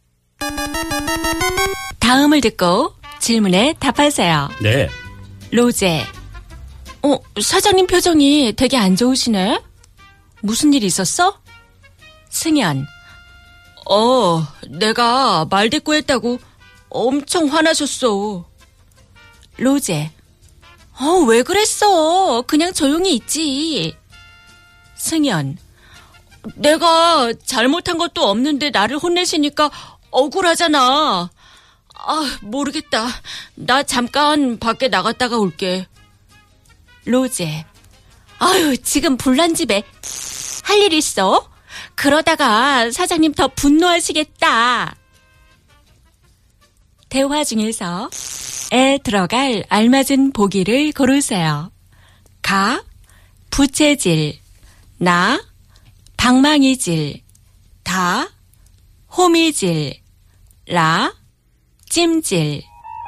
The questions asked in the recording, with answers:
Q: 대화 중에서 에 들어갈 알맞은 보기를 고르세요.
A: Ka, buchejil.